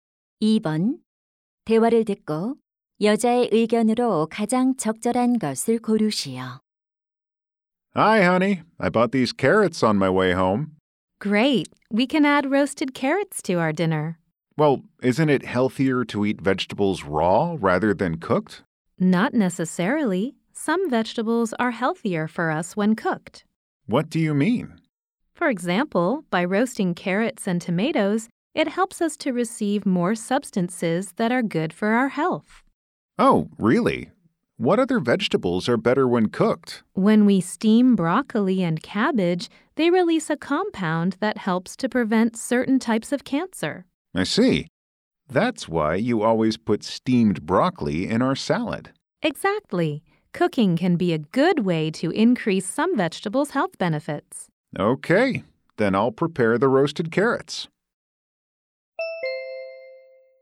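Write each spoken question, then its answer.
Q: 대화를 듣고 여자의 의견으로 가장 적절한 것을 고르시오.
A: 일부 채소는 익혀 먹으면 건강에 더 좋다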